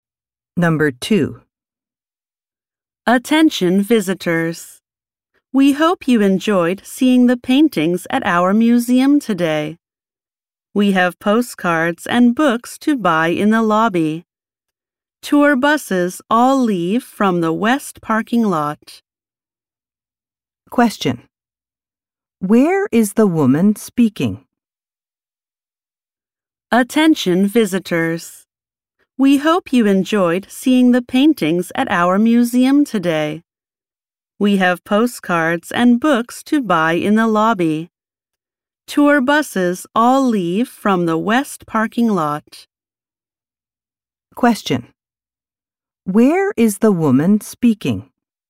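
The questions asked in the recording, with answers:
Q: Where is the woman speaking?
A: At a museum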